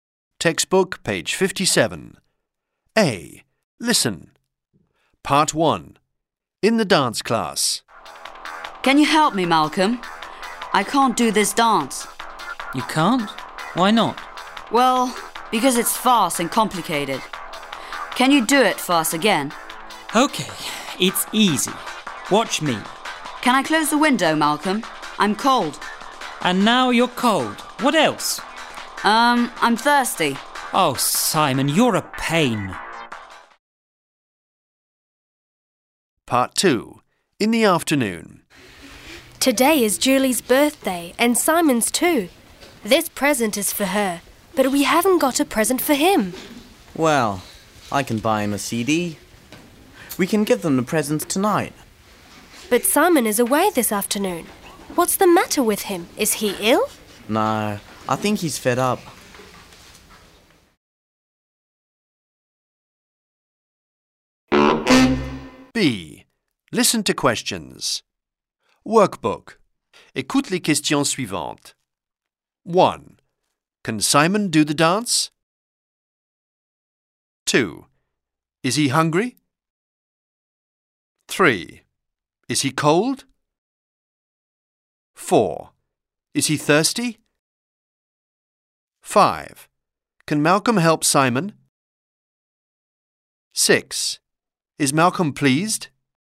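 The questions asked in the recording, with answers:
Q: Can Simon do the dance?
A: No, he can't.

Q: Is he cold?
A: Yes, he is.

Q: Is he thirsty?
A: Yes, he is.

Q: Is Malcolm pleased?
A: No, he isn't.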